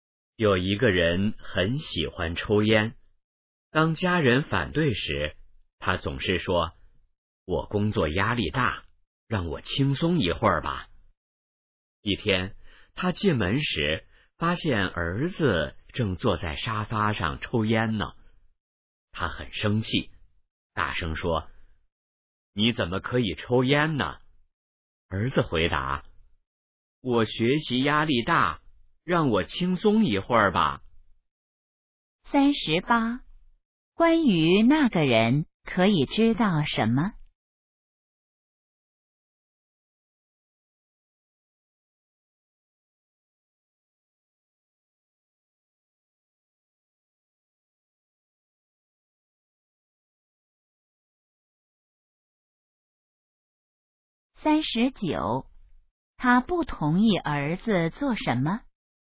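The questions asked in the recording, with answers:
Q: 他不同意儿子做什么?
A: 抽烟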